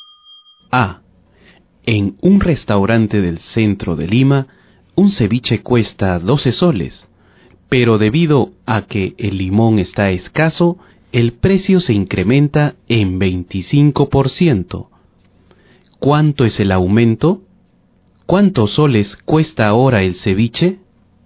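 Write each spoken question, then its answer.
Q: ¿Cuánto es el aumento?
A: 3 soles

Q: ¿Cuántos soles cuesta ahora el ceviche?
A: 15 soles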